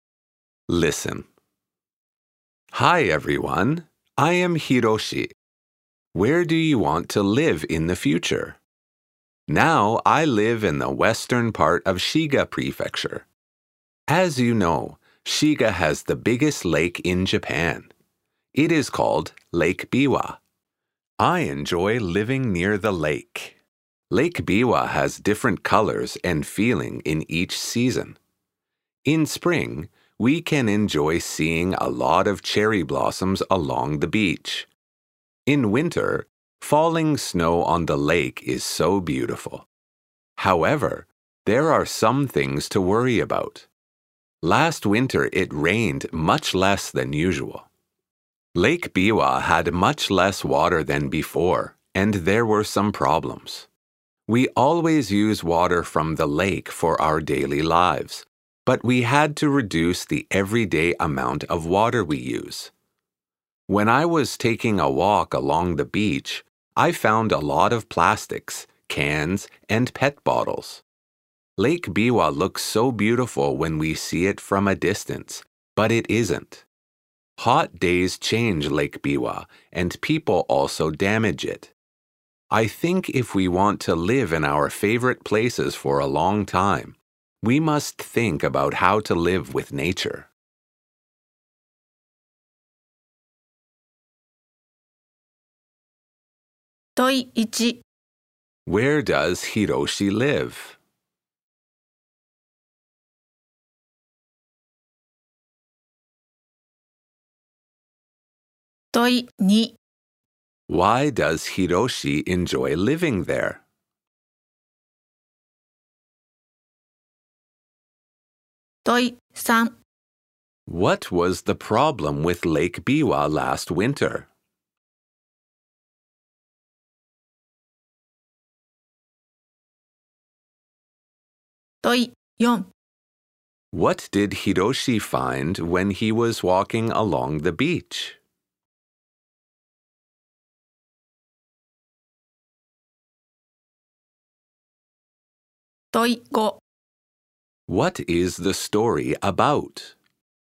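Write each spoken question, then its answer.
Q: Where does Hiroshi live?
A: In the western part of Shiga Prefecture

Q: Why does Hiroshi enjoy living there?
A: Because he lives near Lake Biwa, which has different colors and feelings in each season

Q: What was the problem with Lake Biwa last winter?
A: It rained much less than usual, so the lake had much less water

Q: What did Hiroshi find when he was walking along the beach?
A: A lot of plastics, cans, and PET bottles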